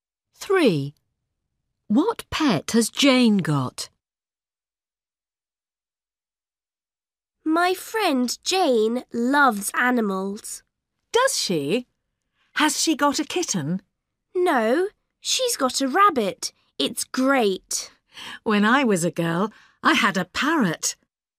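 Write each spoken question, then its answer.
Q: What pet has Jane got?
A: a rabbit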